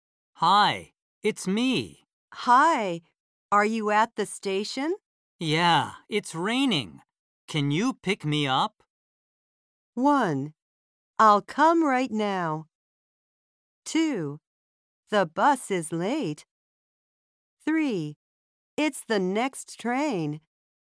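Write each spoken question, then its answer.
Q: Yeah, it's raining. Can you pick me up?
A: 1: I'll come right now.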